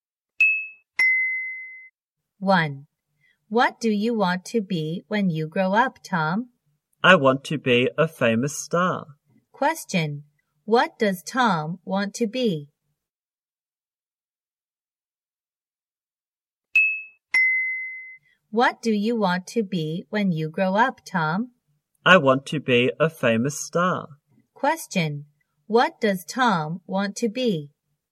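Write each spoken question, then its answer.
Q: What does Tom want to be?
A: A famous star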